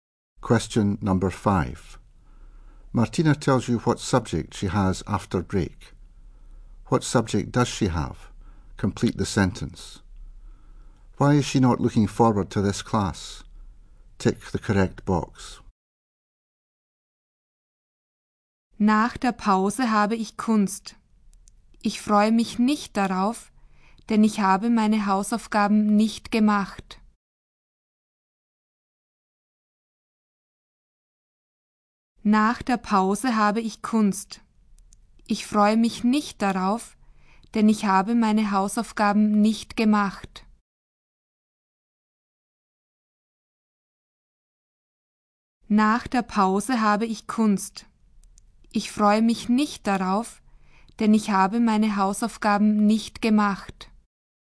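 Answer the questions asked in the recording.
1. Art
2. She hasn't done her homework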